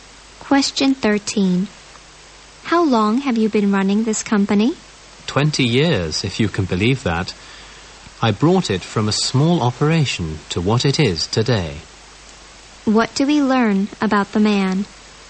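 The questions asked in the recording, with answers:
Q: What do we learn about the man?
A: He has run the company for 20 years and built it up from a small operation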